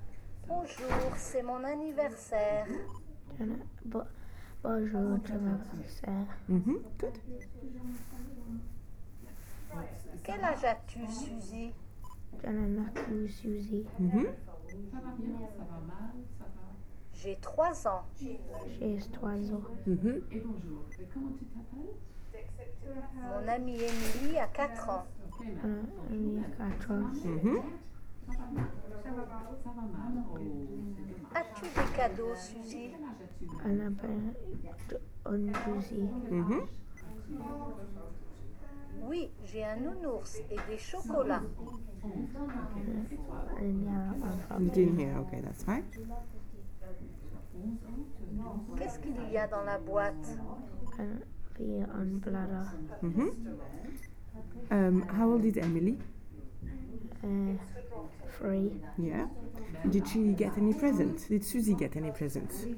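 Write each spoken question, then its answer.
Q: Did Suzy get any presents?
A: Yes, a teddy bear and chocolates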